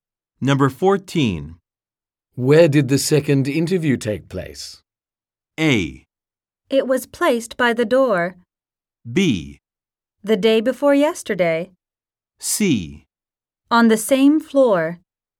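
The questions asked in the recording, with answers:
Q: Where did the second interview take place?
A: C: On the same floor.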